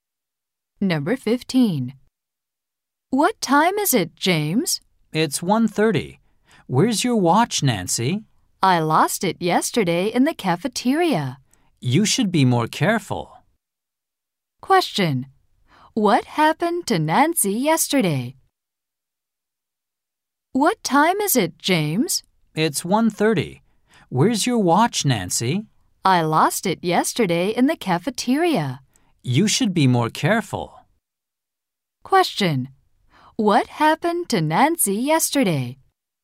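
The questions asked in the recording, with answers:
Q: Question. What happened to Nancy yesterday?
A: She lost her watch.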